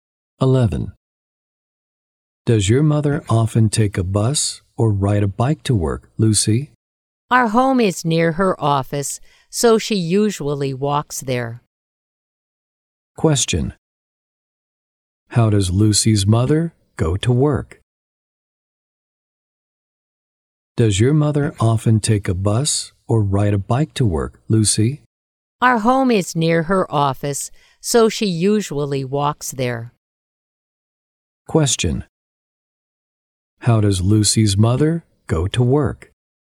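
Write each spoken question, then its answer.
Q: How does Lucy's mother go to work?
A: She walks.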